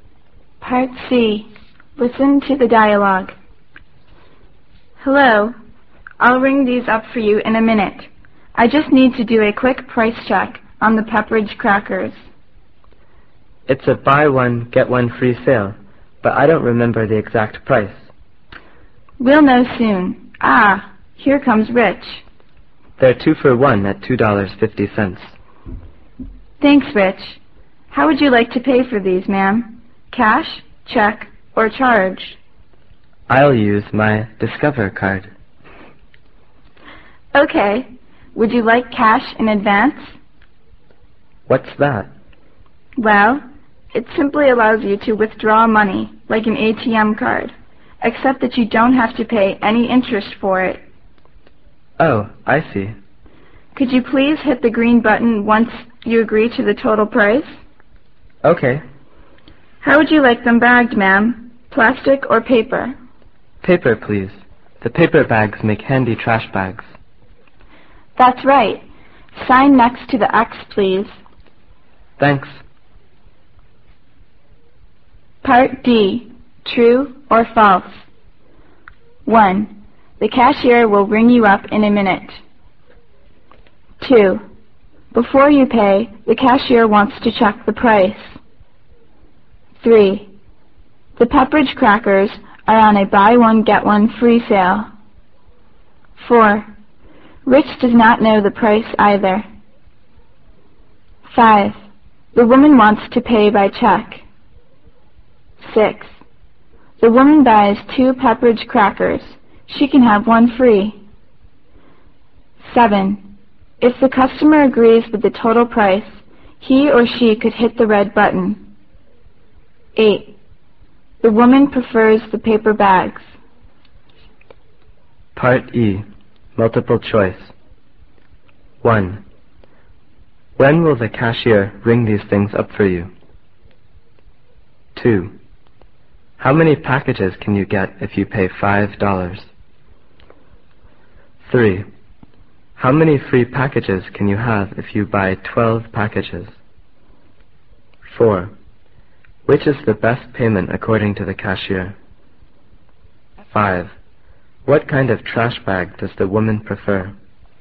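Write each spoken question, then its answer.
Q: The cashier will ring you up in a minute.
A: True

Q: Before you pay, the cashier wants to check the price.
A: True

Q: The Pepperidge crackers are on a buy one, get one free sale.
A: True

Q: Rich does not know the price either.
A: False

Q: The woman wants to pay by check.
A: False

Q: If the customer agrees with the total price, he or she could hit the red button.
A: False

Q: The woman prefers the paper bags.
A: True

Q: When will the cashier ring these things up for you?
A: In a minute

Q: What kind of trash bag does the woman prefer?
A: Paper bags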